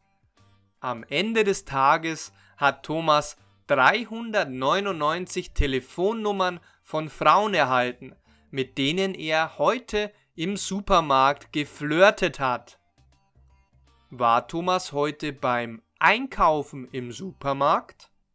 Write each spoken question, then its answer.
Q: War Thomas heute beim Einkaufen im Supermarkt?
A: Nein, er war nicht beim Einkaufen im Supermarkt.